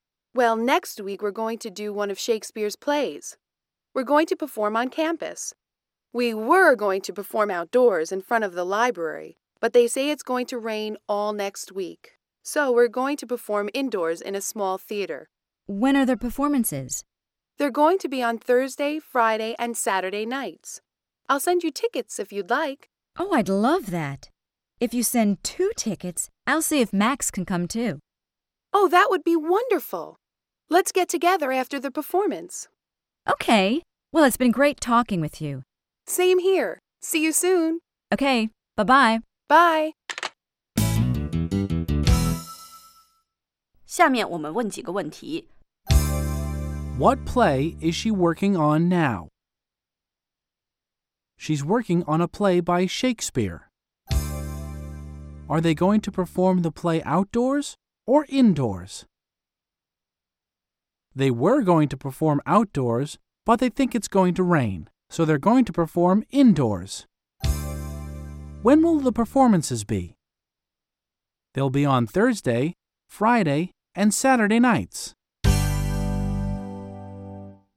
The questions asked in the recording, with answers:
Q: What play is she working on now?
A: She's working on a play by Shakespeare.